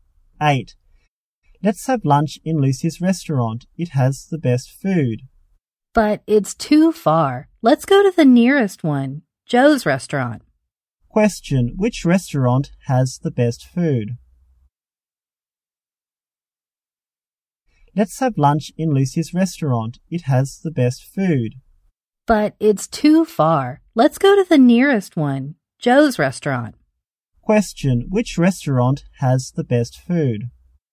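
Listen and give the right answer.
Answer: Lucy's restaurant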